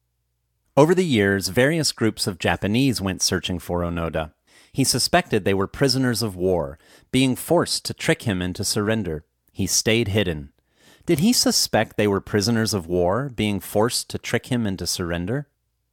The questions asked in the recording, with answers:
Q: Did he suspect they were prisoners of war, being forced to trick him into surrender?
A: Yes, he suspected they were prisoners of war, being forced to trick him into surrender.